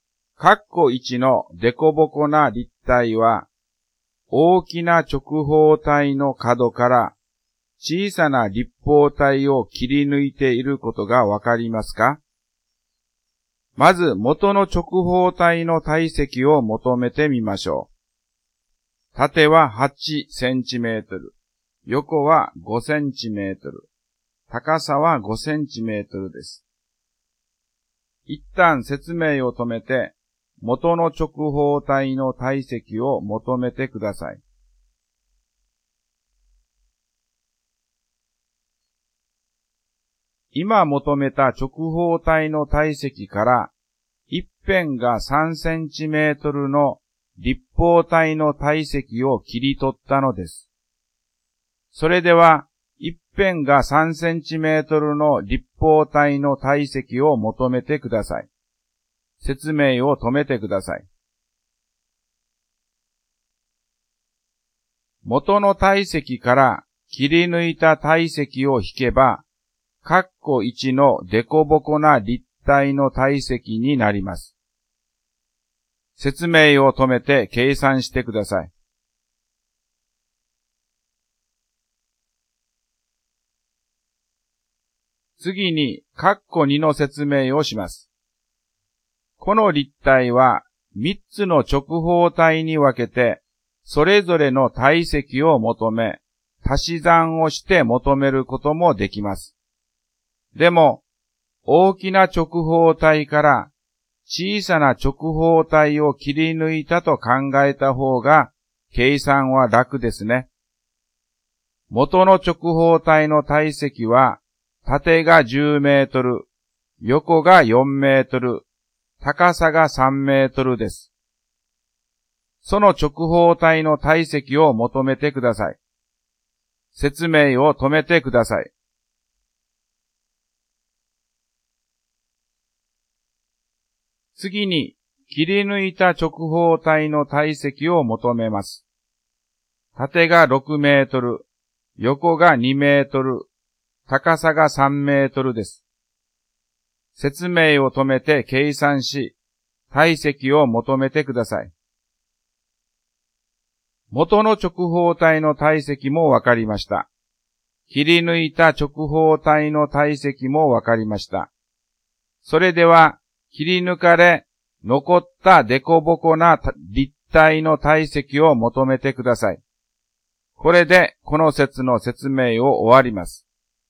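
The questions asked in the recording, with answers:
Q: 一旦説明を止めて、元の直方体の体積を求めてください。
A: 200立方センチメートル

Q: それでは、一辺が3センチメートルの立方体の体積を求めてください。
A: 27立方センチメートル

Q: 説明を止めて計算してください。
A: 173立方センチメートル

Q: その直方体の体積を求めてください。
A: 120立方メートル

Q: 説明を止めて計算し、体積を求めてください。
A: 36立方メートル

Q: それでは、切り抜かれ、残ったデコボコな立体の体積を求めてください。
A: 84立方メートル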